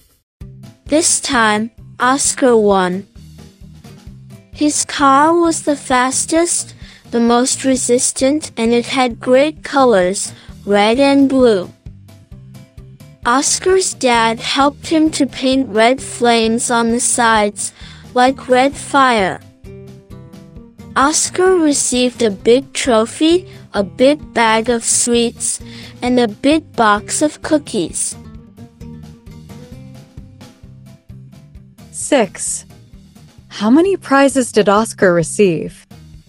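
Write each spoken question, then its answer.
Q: How many prizes did Oscar receive?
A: Three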